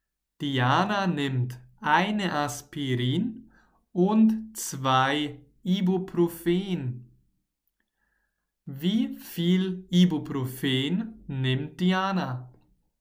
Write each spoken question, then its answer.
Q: Wie viel Ibuprofen nimmt Diana?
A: Zwei. Sie nimmt zwei Ibuprofen.